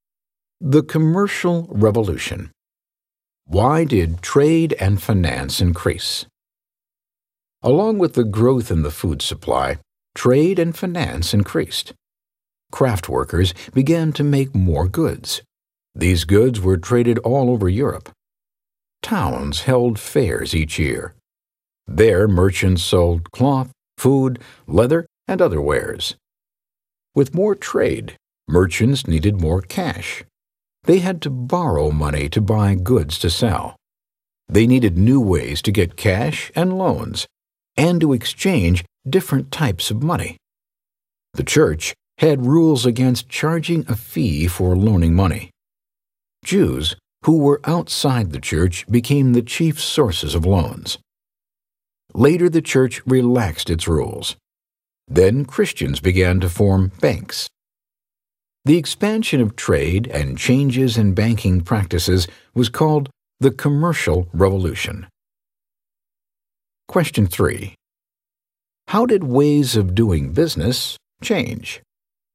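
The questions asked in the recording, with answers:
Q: How did ways of doing business change?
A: Trade grew, and people made new ways to get loans and exchange money, such as banks (the Commercial Revolution)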